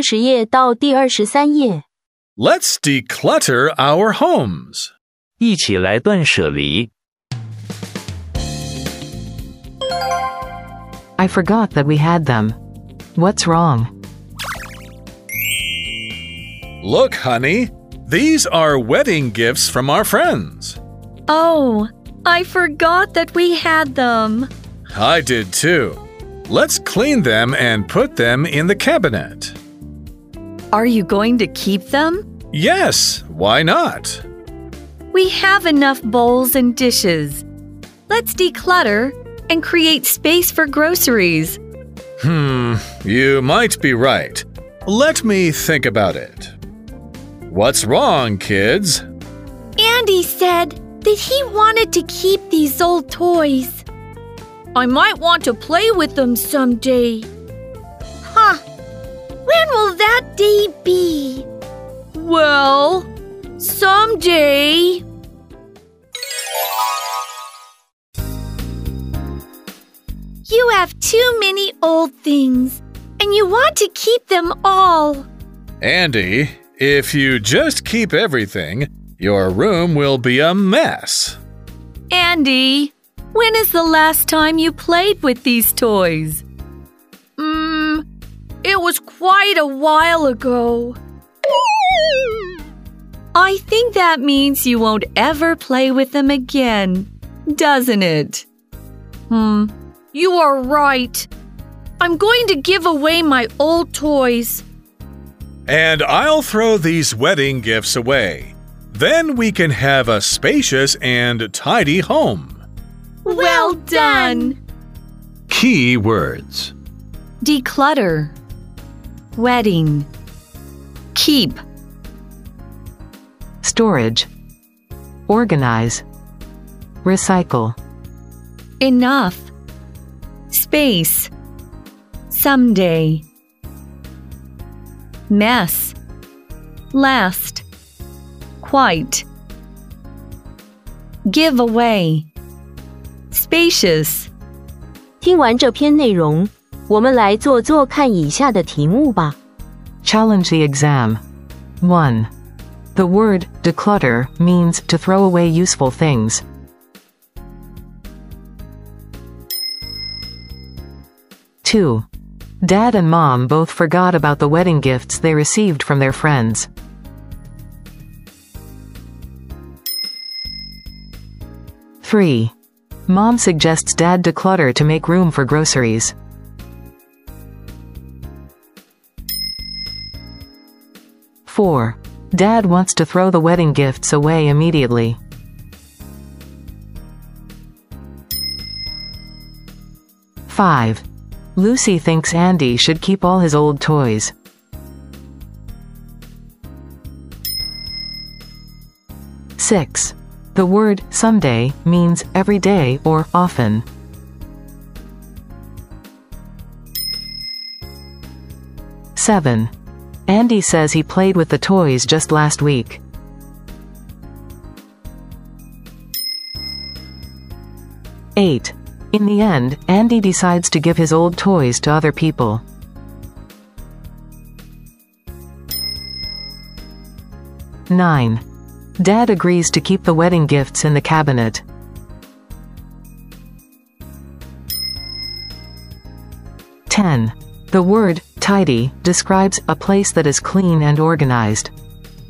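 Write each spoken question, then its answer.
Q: The word declutter means to throw away useful things.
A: False

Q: Dad and Mom both forgot about the wedding gifts they received from their friends.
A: True

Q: The word someday means every day or often.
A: False

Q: Andy says he played with the toys just last week.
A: False

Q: In the end, Andy decides to give his old toys to other people.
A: True

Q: Dad agrees to keep the wedding gifts in the cabinet.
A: False

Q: The word, tidy, describes a place that is clean and organized.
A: True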